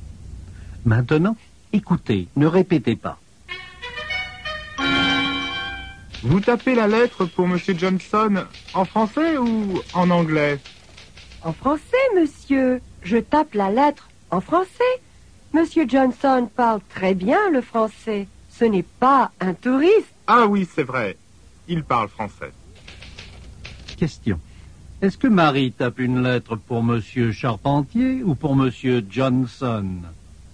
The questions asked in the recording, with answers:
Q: Est-ce que Marie tape une lettre pour Monsieur Charpentier ou pour Monsieur Johnson?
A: Elle tape une lettre pour Monsieur Johnson.